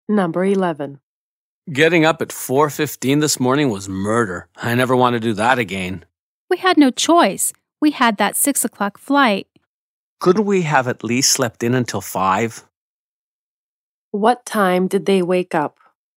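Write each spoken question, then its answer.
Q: What time did they wake up?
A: At 4:15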